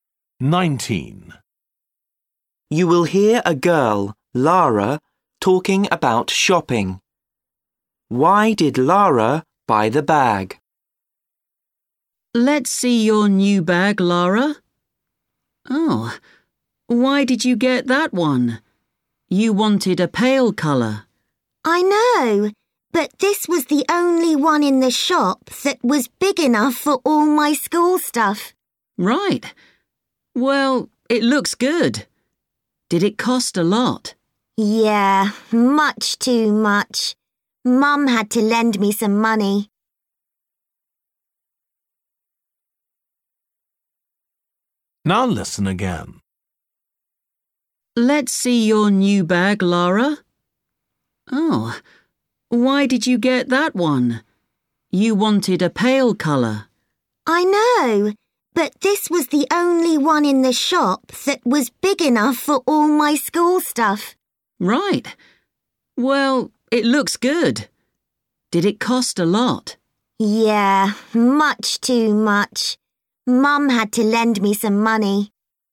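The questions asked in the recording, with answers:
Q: Why did Lara buy the bag?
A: It was the only one big enough for her school things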